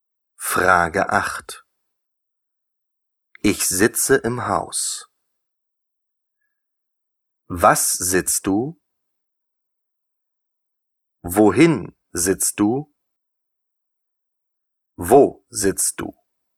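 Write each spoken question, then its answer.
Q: Ich sitze im Haus.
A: Wo sitzt du?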